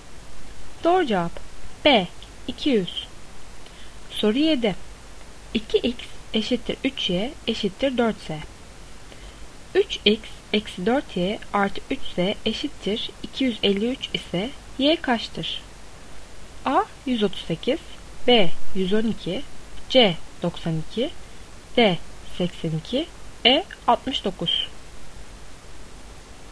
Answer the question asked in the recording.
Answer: Doğru cevap C 92.